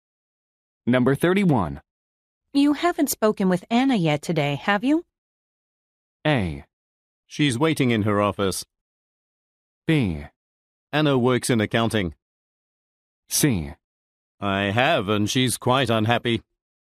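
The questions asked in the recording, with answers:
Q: You haven't spoken with Anna yet today, have you?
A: C: I have, and she's quite unhappy.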